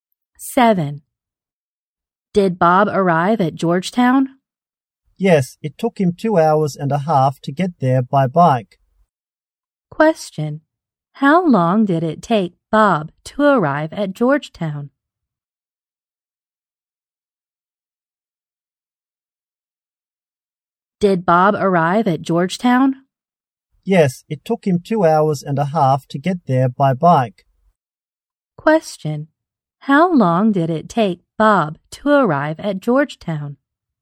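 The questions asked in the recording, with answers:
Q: How long did it take Bob to arrive at Georgetown?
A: 2.5 hours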